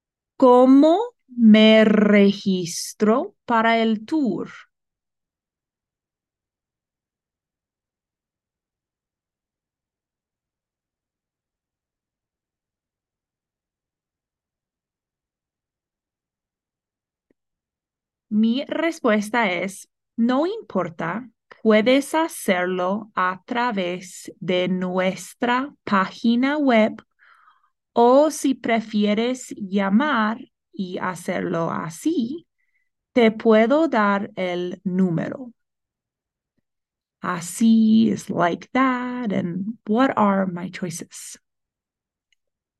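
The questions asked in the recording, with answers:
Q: what are my choices?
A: Register through the website or call by phone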